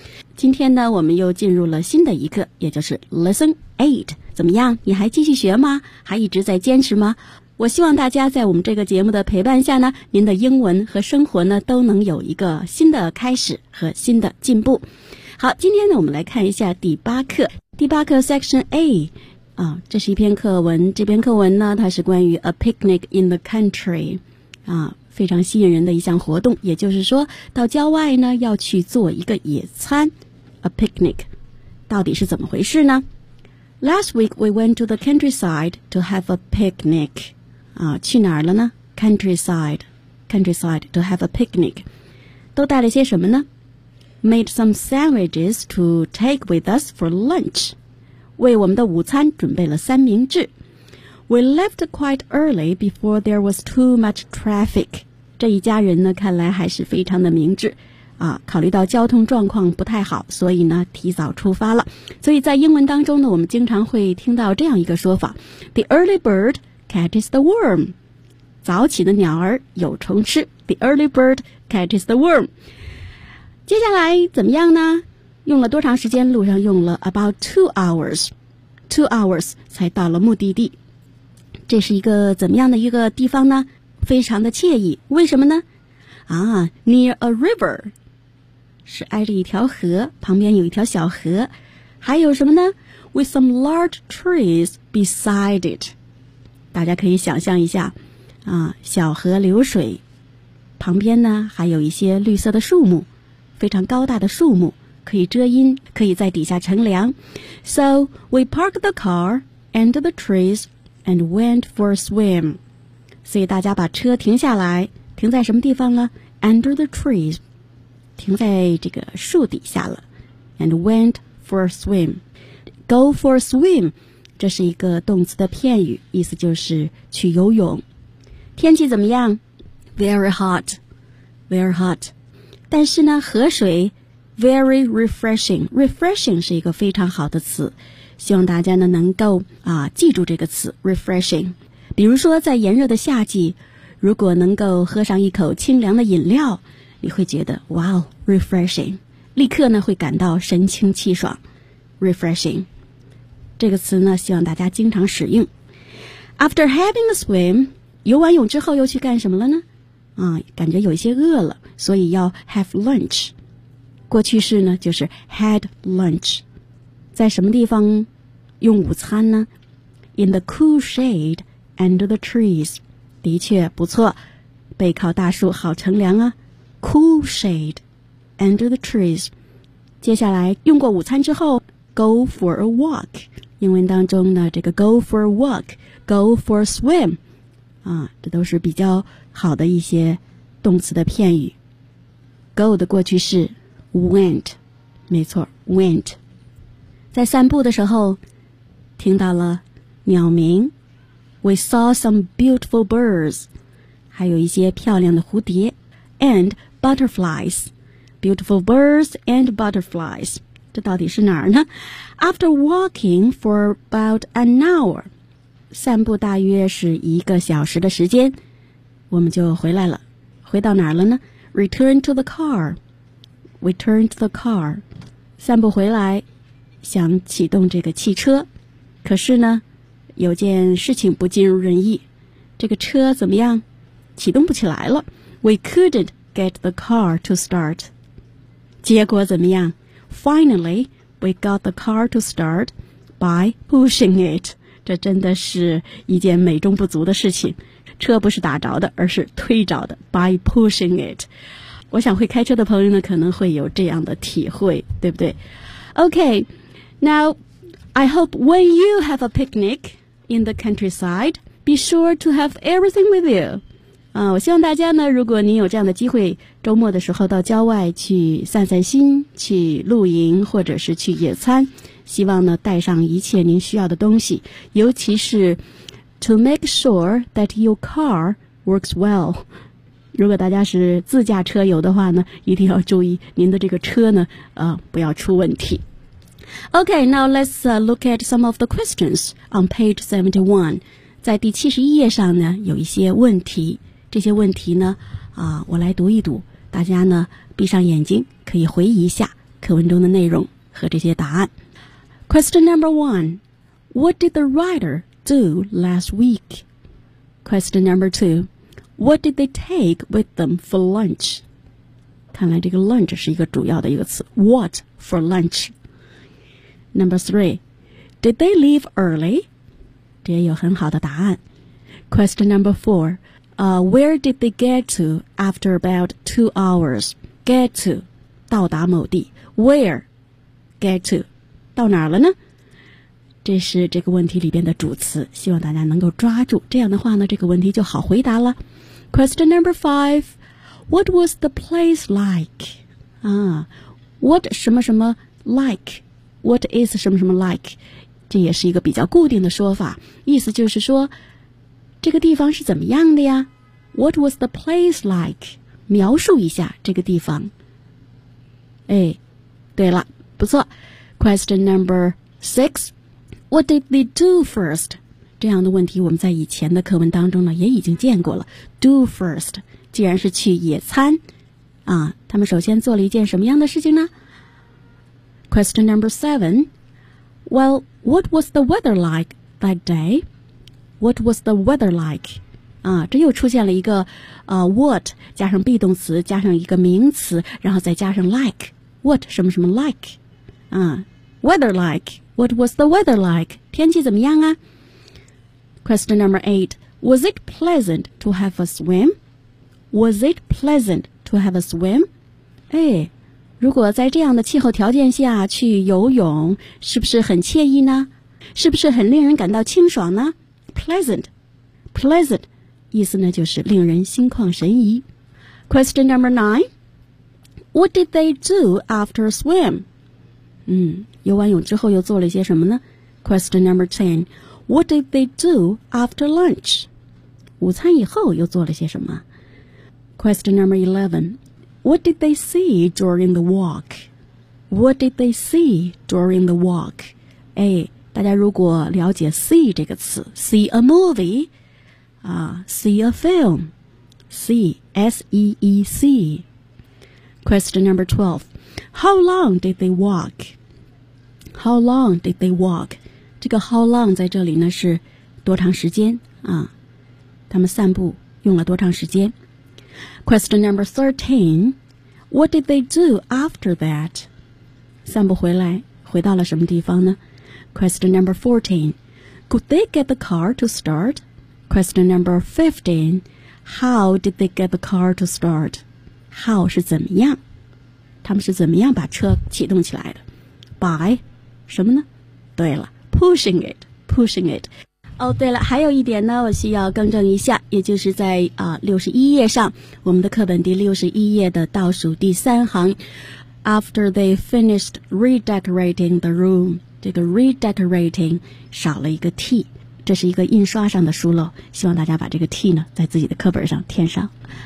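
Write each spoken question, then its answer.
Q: what did the writer do last week?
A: They went to the countryside to have a picnic.

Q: what did they take with them for lunch?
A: Sandwiches.

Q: did they leave early?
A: Yes, they left quite early, before there was too much traffic.

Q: where did they get to after about 2 hours?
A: A nice place near a river with some large trees beside it.

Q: what was the place like?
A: It was nice, near a river with some large trees beside it.

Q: What did they do first?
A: They parked the car under the trees and went for a swim.

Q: Well, what was the weather like that day?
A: It was very hot.

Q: was it pleasant to have a swim?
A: Yes, the water was very refreshing.

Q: What did they do after swim?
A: They had lunch in the cool shade under the trees.

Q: What did they do after lunch?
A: They went for a walk.

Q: What did they see during the walk?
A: Some beautiful birds and butterflies.

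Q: How long did they walk?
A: About an hour.

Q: What did they do after that?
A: They returned to the car.

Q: Could they get the car to start?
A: No, they couldn't at first.

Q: how did they get the car to start?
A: 对了 ,pushing it.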